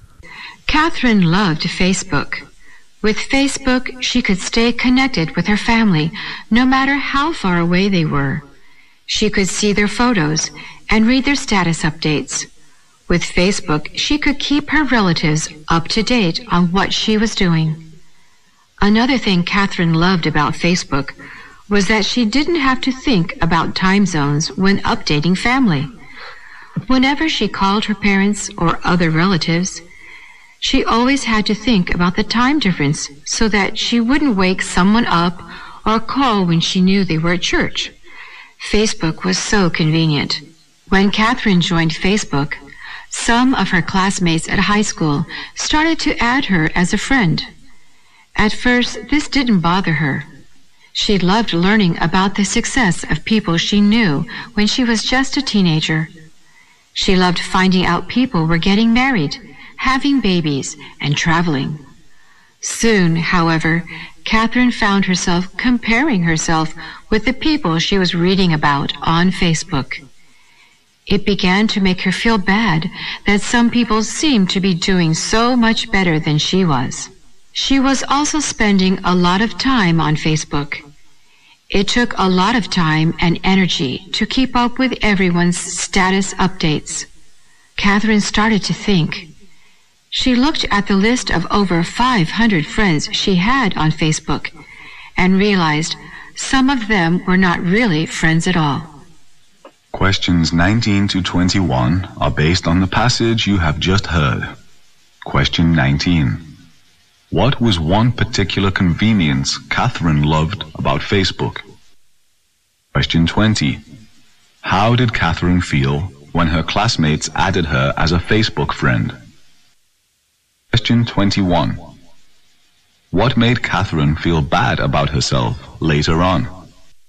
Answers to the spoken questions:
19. That particular convenience is that she doesn't have to worry about time zones and time differences when she needs to keep her families and relatives updated.
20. She doesn't think this would bother her, and she really feels good.
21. Number one is that she couldn't help herself from comparing with those other people.